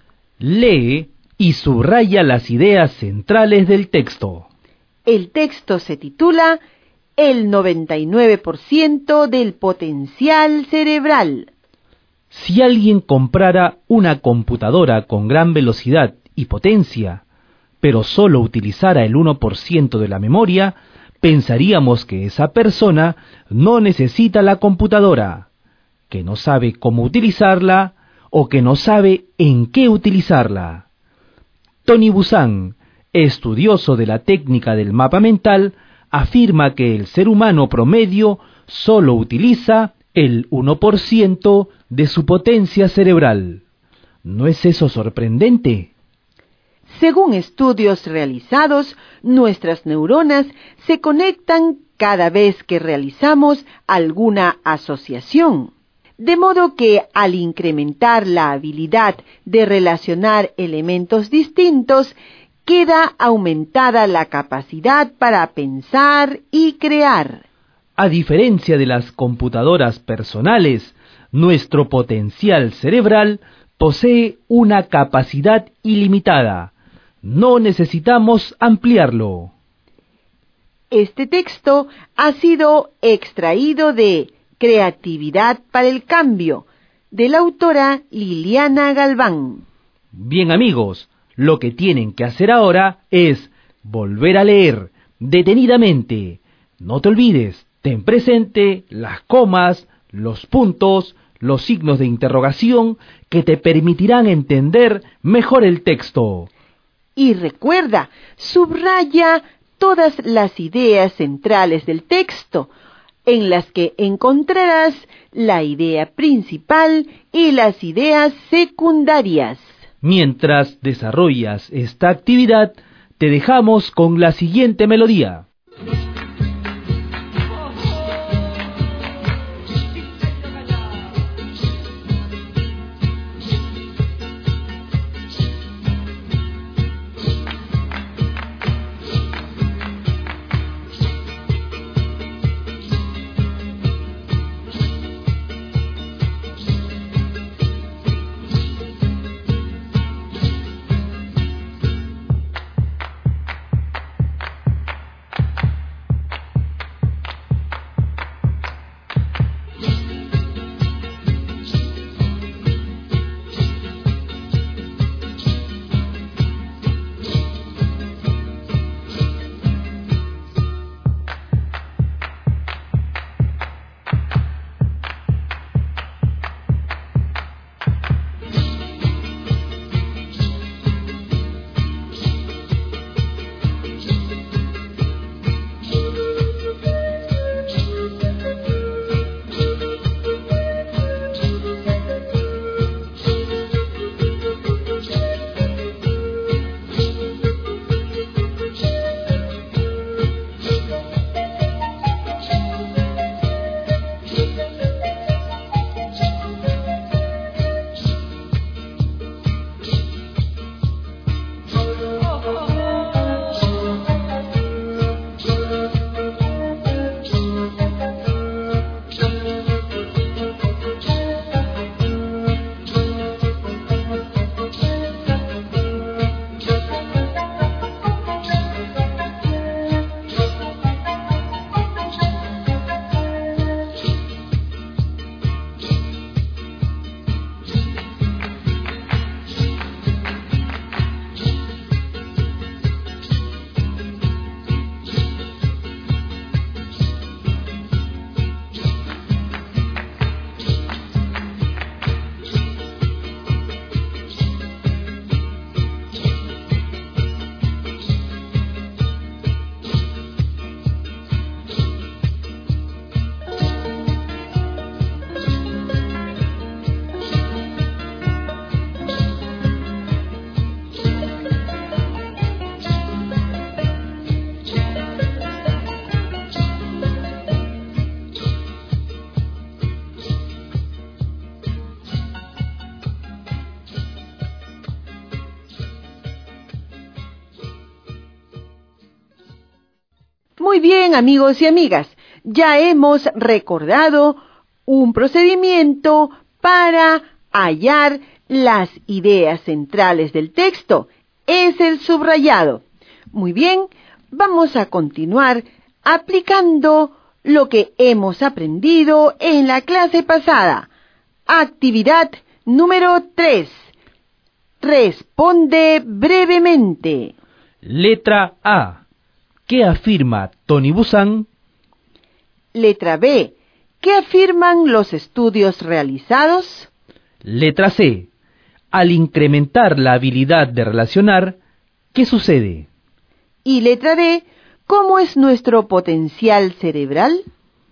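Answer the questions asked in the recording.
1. Que el ser humano promedio solo utiliza el 1% de su potencia cerebral
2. Que nuestras neuronas se conectan cada vez que realizamos alguna asociación
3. Aumenta la capacidad para pensar y crear
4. Tiene una capacidad ilimitada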